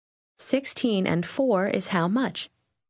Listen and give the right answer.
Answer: 20.